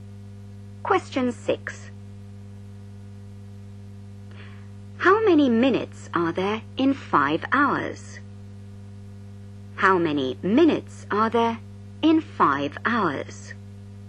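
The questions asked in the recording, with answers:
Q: How many minutes are there in 5 hours?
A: 300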